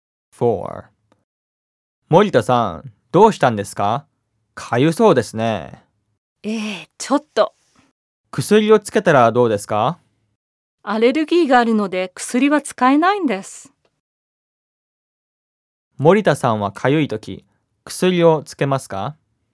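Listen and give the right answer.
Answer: いいえ、アレルギーがあるのでつけません。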